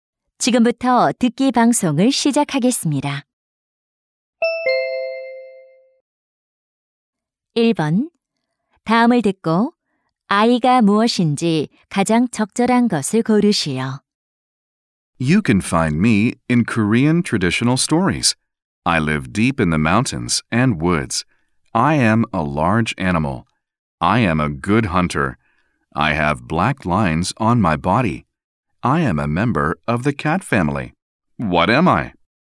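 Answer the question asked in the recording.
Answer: 호랑이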